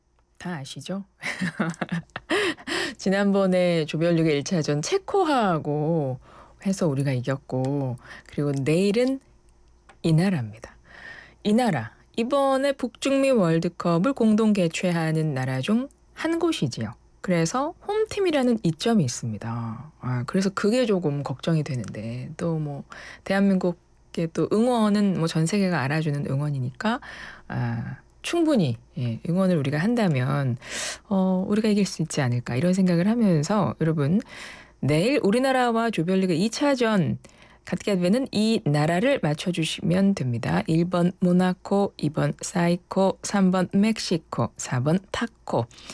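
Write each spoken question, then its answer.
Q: 여러분 내일 우리나라와 조별리그 2차전 갖게 되는 이 나라를 맞춰주시면 됩니다.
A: 3: 멕시코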